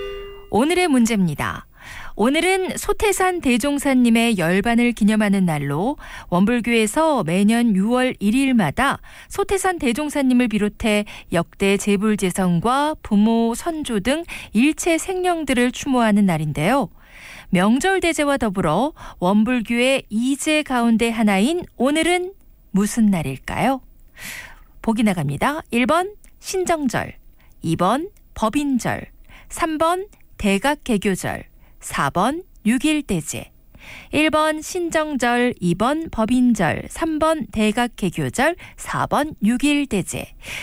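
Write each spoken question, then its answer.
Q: 명절대제와 더불어 원불교의 이제 가운데 하나인 오늘은 무슨 날일까요?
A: 4: 6.1대제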